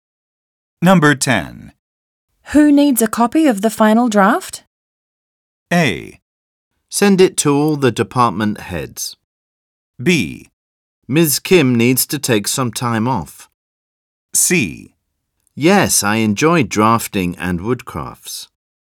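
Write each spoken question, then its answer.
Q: Who needs a copy of the final draft?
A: A: Send it to all the department heads.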